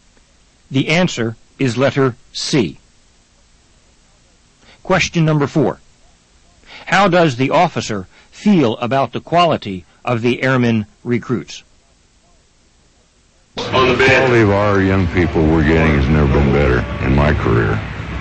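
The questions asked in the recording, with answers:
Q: How does the officer feel about the quality of the airman recruits?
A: It has never been better in his career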